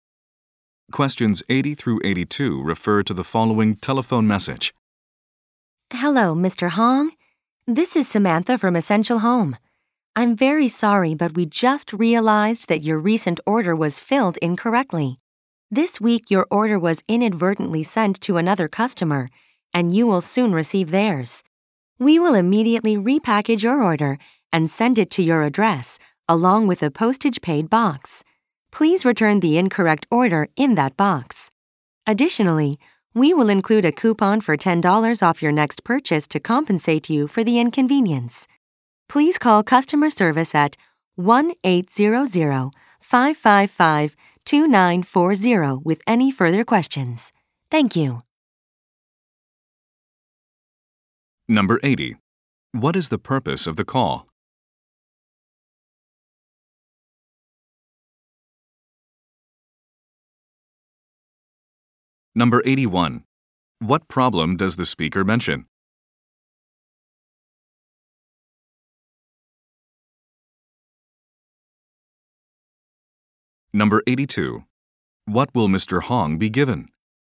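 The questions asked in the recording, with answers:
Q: What is the purpose of the call?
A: To apologize for an incorrectly filled order

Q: What problem does the speaker mention?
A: His order was sent to another customer

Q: What will Mr. Hong be given?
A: A $10 coupon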